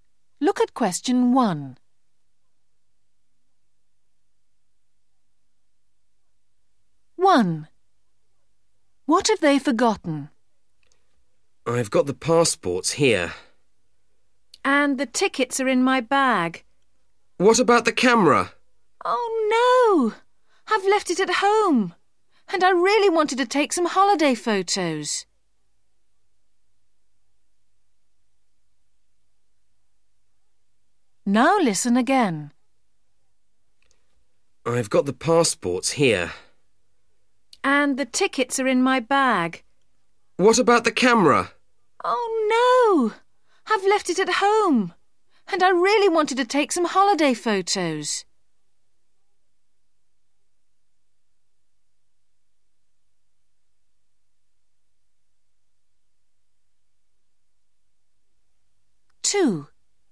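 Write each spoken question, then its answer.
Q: What have they forgotten?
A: The camera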